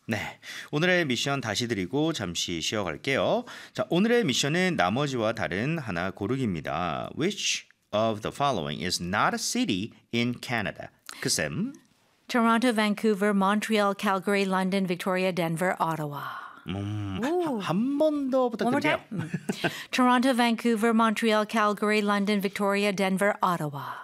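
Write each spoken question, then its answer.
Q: Which of the following is not a city in Canada?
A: Denver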